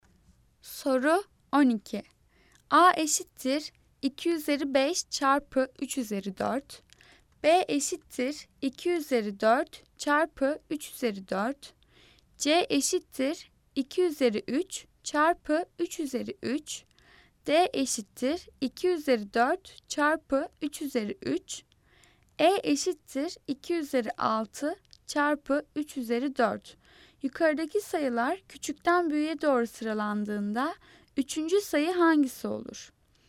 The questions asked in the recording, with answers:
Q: Yukarıdaki sayılar küçükten büyüğe doğru sıralandığında üçüncü sayı hangisi olur?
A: Cevap B, B.